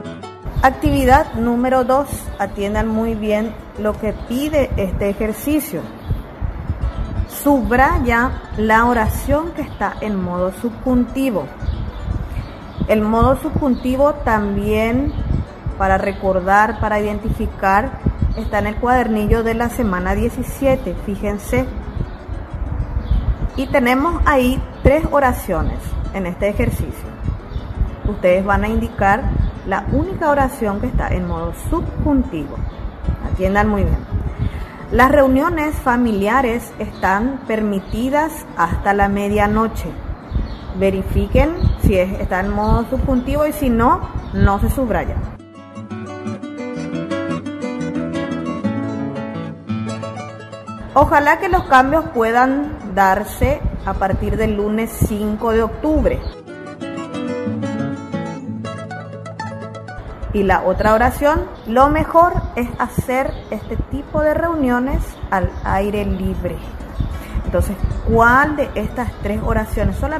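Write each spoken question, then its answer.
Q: Subraya la oración que está en modo subjuntivo.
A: Ojalá que los cambios puedan darse a partir del lunes 5 de octubre.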